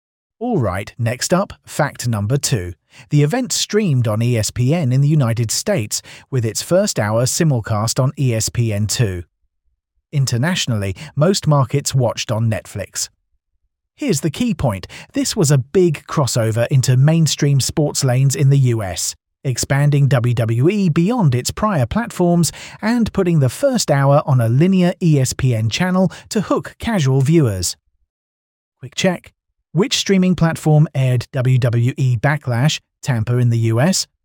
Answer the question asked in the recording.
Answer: Correct answer, ESPN.